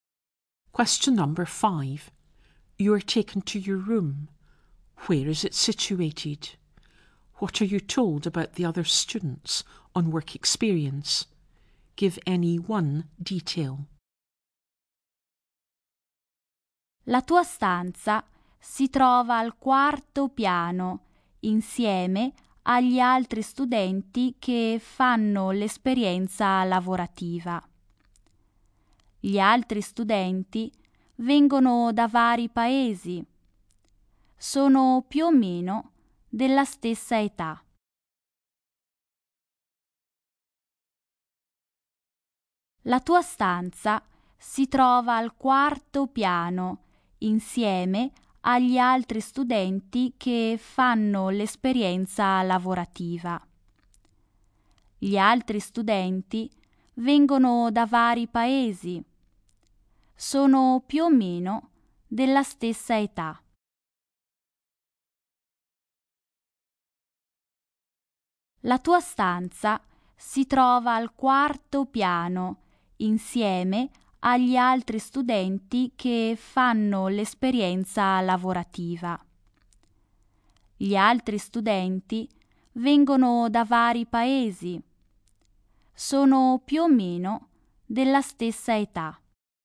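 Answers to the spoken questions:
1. On the fourth floor
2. They come from various countries and are about the same age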